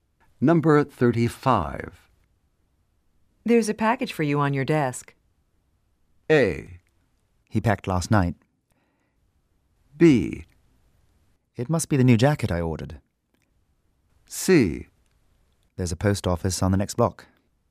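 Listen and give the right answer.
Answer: B: It must be the new jacket I ordered.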